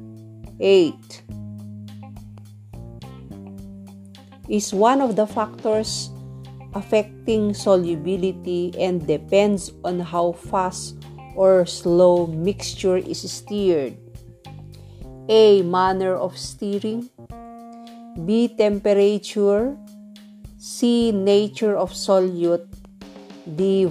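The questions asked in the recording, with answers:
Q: Is one of the factors affecting solubility and depends on how fast or slow mixture is stirred.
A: A: Manner of stirring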